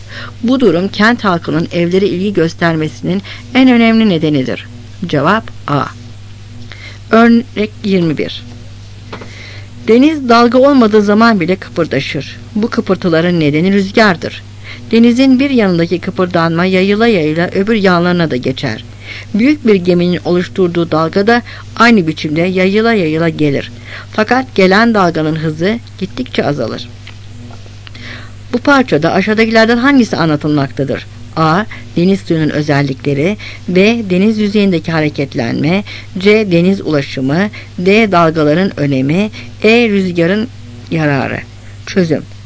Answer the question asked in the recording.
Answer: Cevap B.